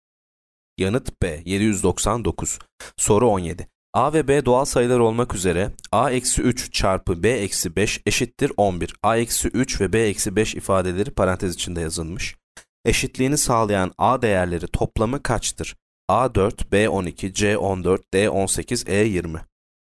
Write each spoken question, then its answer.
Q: Eşitliğini sağlayan A değerleri toplamı kaçtır?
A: Yanıt D 18.